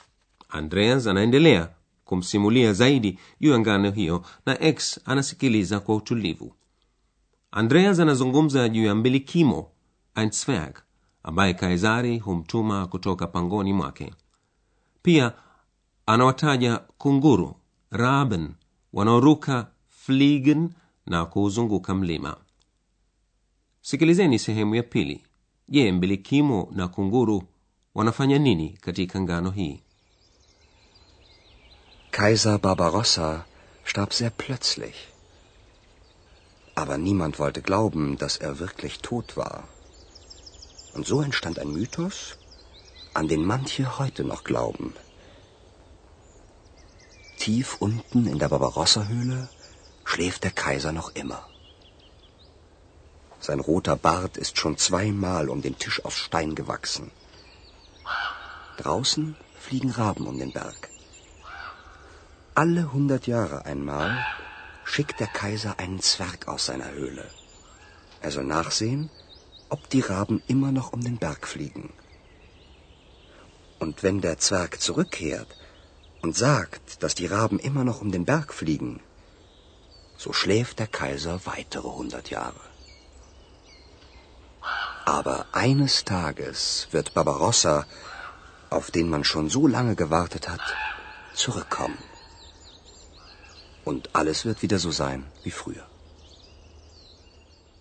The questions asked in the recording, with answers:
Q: je mbilikimo na kunguru wanafanya nini katika ngano hii?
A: Kazi yake ni kuangalia iwapo kunguru wanaendelea kuruka na kuzunguka mlima.